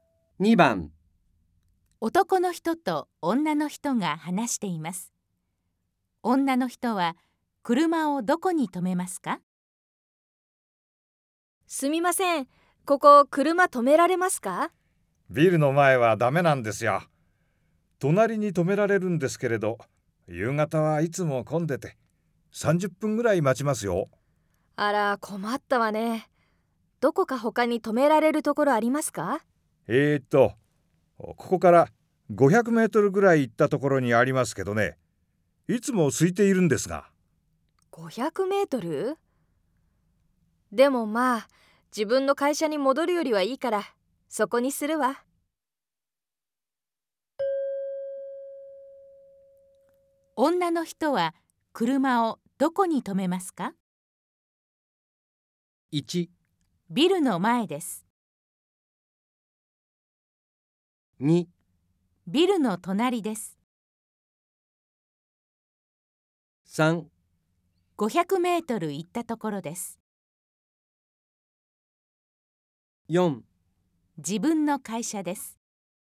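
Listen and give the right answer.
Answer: 3: 500メートル行ったところです。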